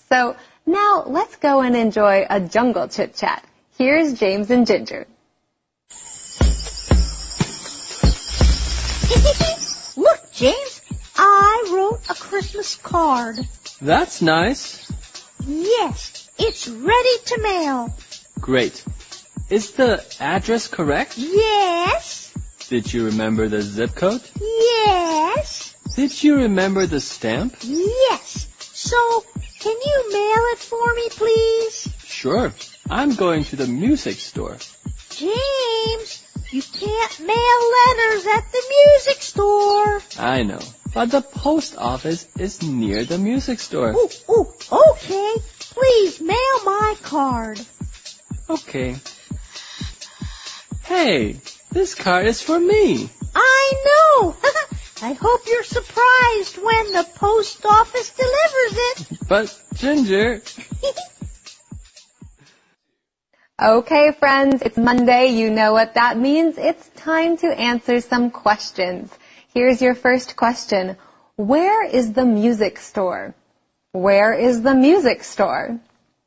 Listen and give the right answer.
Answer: It is near the post office.